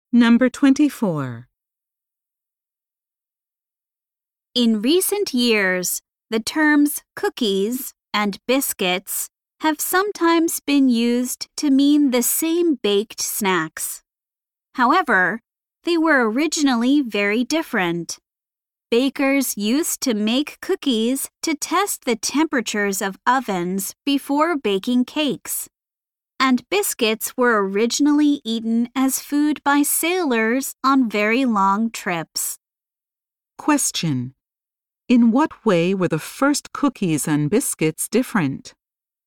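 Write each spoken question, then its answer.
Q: In what way were the first cookies and biscuits different?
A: Cookies were made to test oven temperatures, while biscuits were eaten by sailors on long trips.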